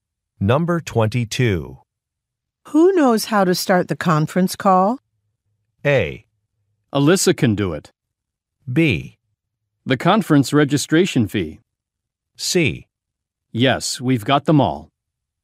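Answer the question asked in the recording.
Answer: A: Alyssa can do it.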